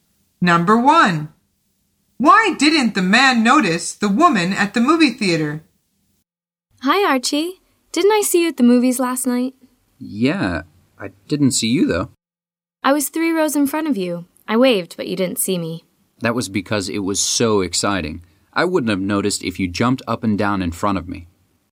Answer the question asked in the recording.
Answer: The answer is because he was so interested in the film.